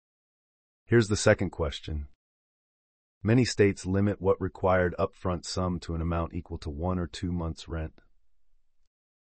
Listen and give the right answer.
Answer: The answer is a security deposit.